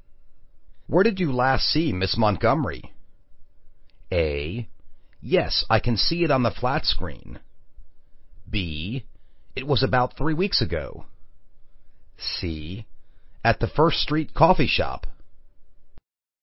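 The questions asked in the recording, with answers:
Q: Where did you last see Miss Montgomery?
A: C: At the First Street Coffee Shop.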